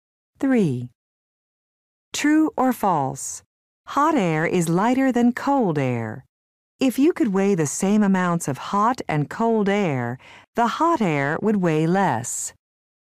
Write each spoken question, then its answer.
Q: True or false? Hot air is lighter than cold air.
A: The answer is true.